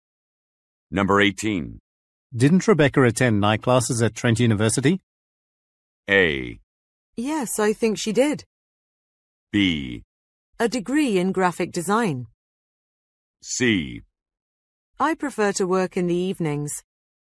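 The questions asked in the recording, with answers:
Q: Didn't Rebecca attend night classes at Trent University?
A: A: Yes, I think she did.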